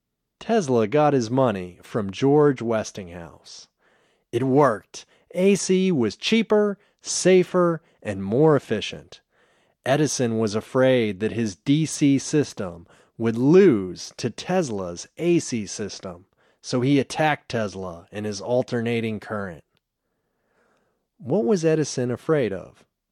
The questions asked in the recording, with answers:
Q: What was Edison afraid of?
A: He was afraid that his DC system would lose to Tesla's AC system.